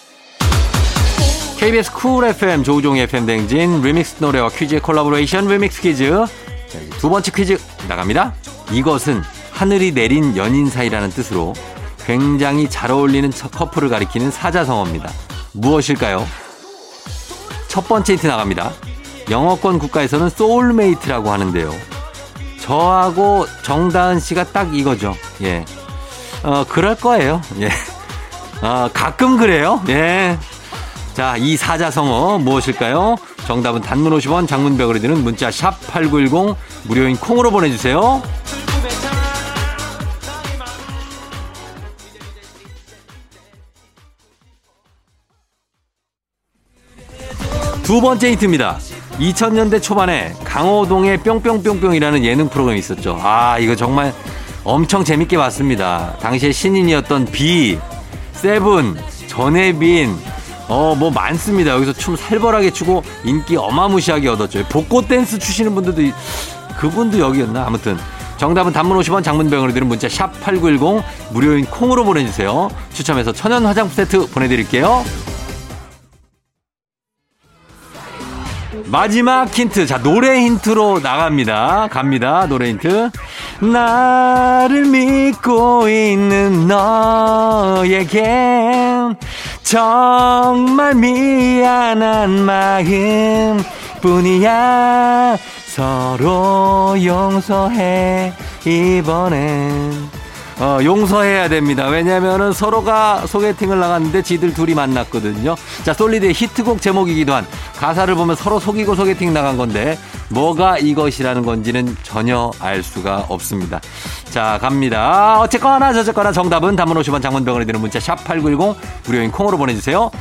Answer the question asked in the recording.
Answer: 정답은 바로 두구두구두구두구두구두구두구두구두구두구 천생연분입니다.